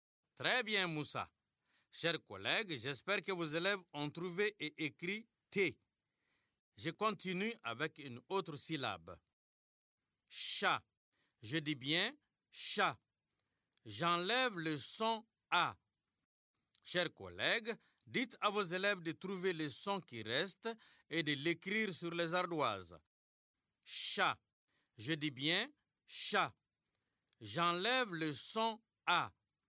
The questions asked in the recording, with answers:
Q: Chat. Je dis bien chat. J'enlève le son A.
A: C'est le son ch.